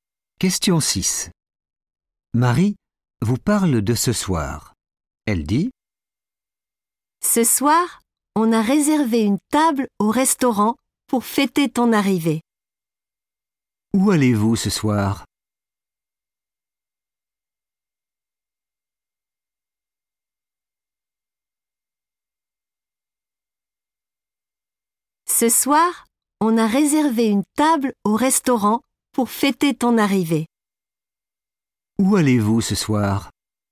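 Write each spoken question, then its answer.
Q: Où allez-vous ce soir ?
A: au restaurant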